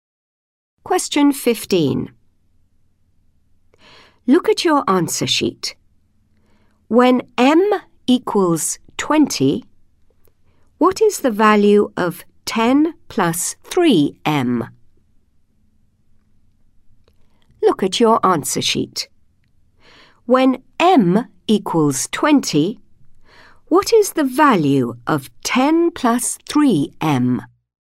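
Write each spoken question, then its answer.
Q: When M equals 20, what is the value of 10 plus 3M?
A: 70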